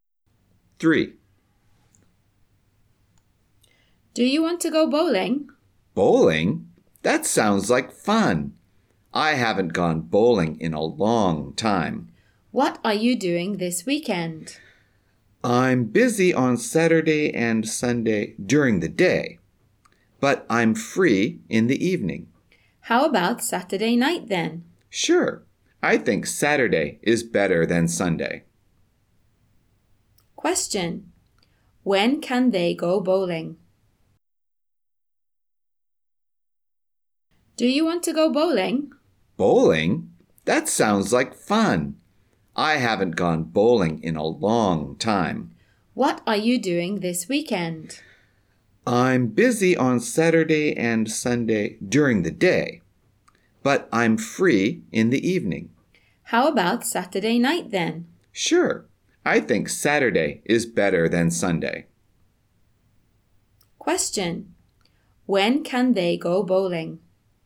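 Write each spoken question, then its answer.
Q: When can they go bowling?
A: Saturday night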